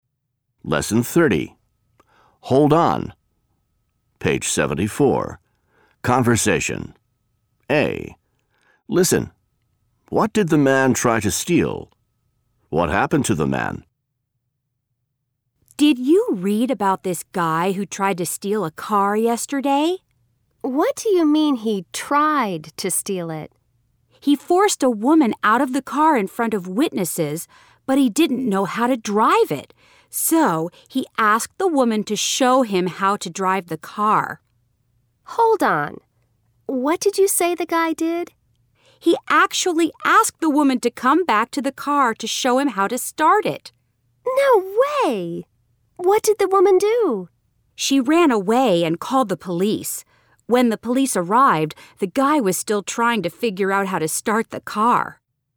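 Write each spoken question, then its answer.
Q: What did the man try to steal?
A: A car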